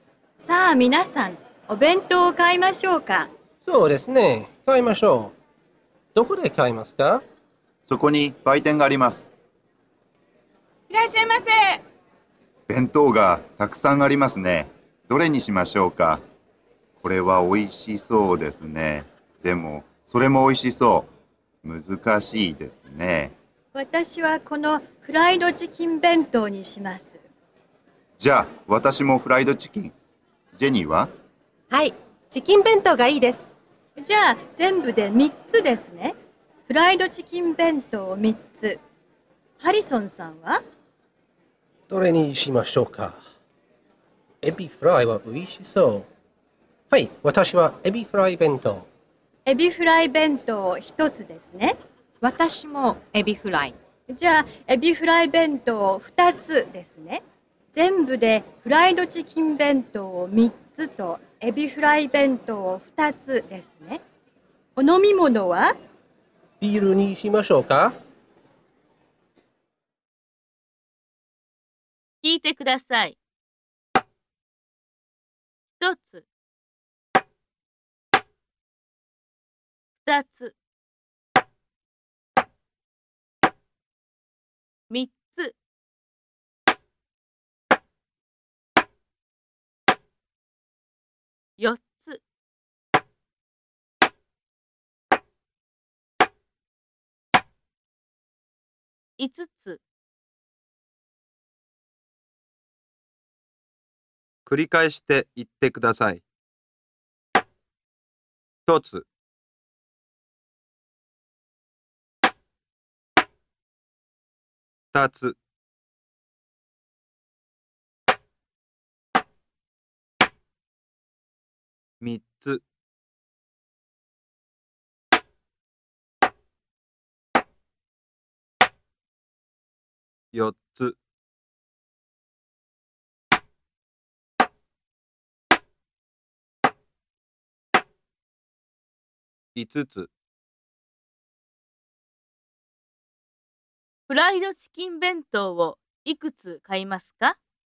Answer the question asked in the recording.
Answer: 3つ買います。